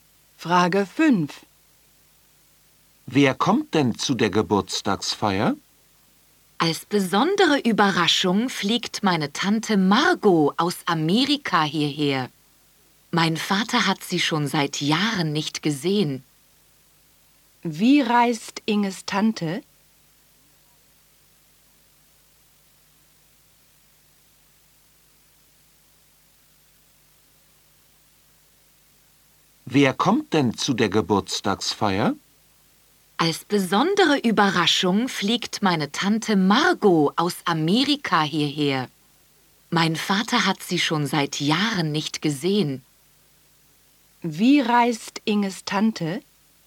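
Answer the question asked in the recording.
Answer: Sie fliegt (aus Amerika)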